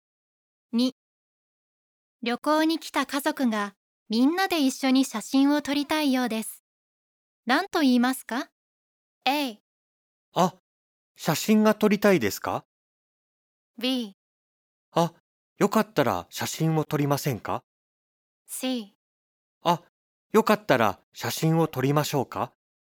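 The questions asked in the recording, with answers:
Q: 何と言いますか?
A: C: あ、よかったら写真を撮りましょうか?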